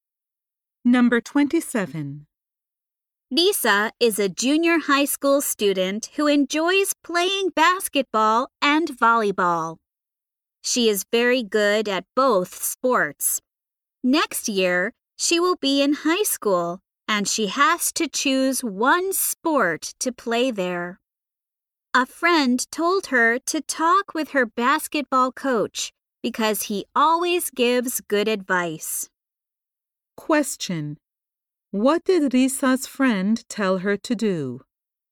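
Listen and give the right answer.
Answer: Talk with her basketball coach.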